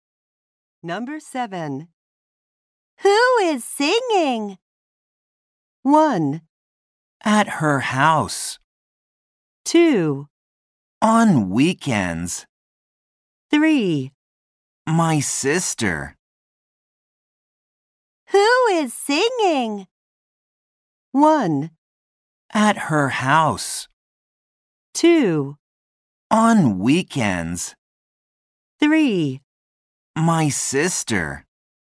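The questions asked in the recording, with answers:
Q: Who is singing?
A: 3: My sister.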